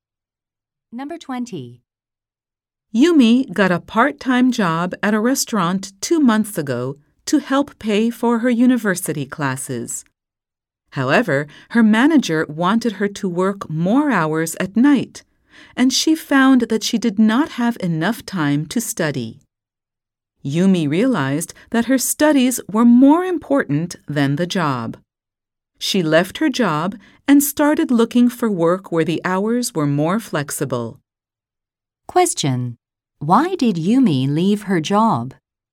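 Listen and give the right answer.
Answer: She did not have enough time to study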